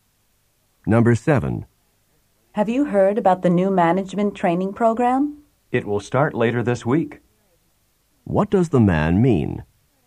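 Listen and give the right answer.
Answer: The training program will begin later this week.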